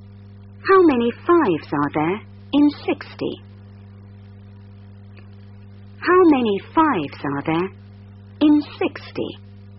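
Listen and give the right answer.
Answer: 12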